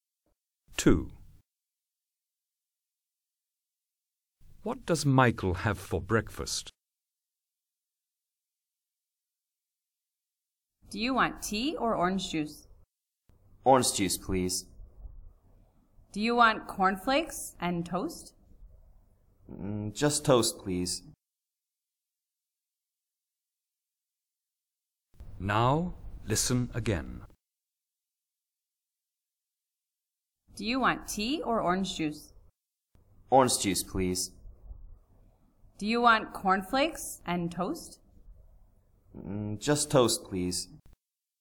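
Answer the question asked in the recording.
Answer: Orange juice and toast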